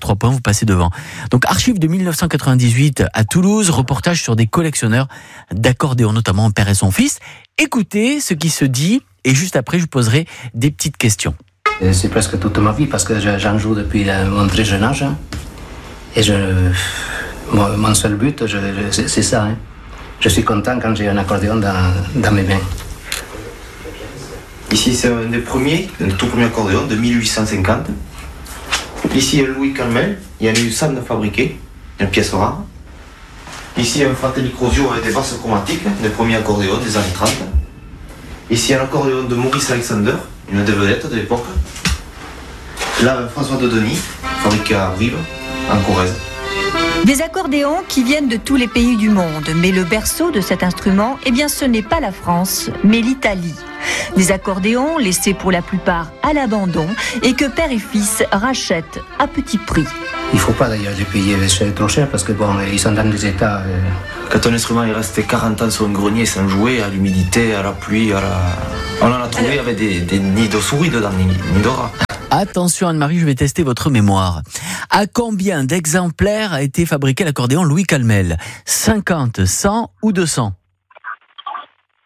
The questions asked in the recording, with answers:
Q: À combien d'exemplaires a été fabriqué l'accordéon Louis Calmel ?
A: 100, bravo !